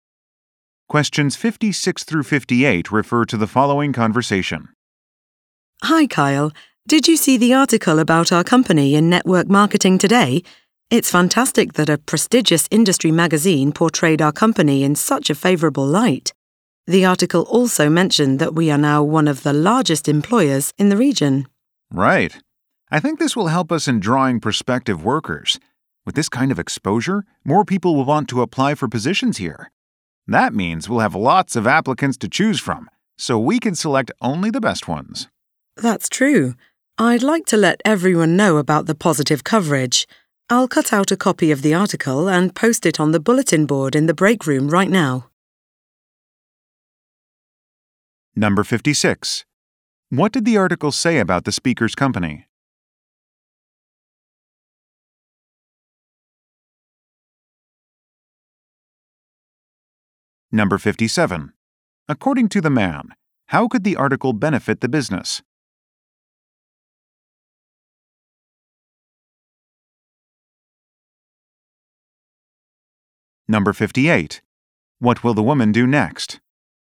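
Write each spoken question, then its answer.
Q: What did the article say about the speaker's company?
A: It is one of the largest employers in the region

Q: According to the man, how could the article benefit the business?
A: By attracting more job applicants

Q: What will the woman do next?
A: Post the article on the bulletin board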